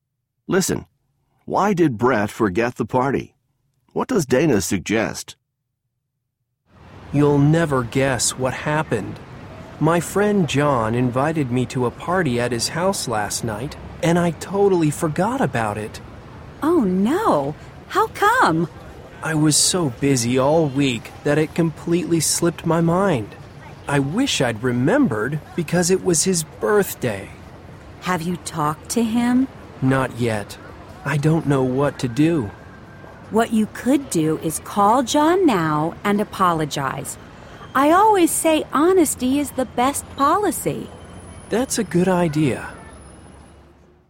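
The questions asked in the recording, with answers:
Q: Why did Brett forget the party?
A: He was so busy all week that it slipped his mind.

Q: What does Dana suggest?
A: Call John now and apologize.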